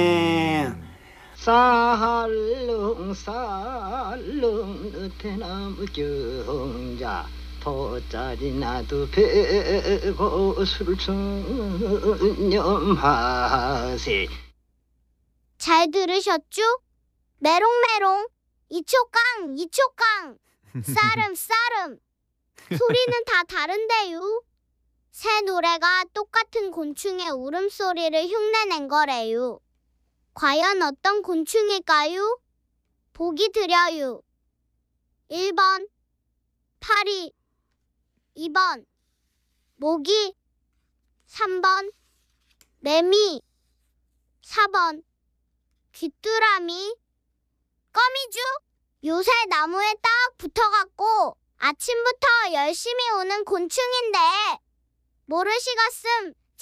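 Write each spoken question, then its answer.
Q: 과연 어떤 곤충일까요? 보기 드려요. 1번 파리, 2번 모기, 3번 매미, 4번 귀뚜라미.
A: 3: 매미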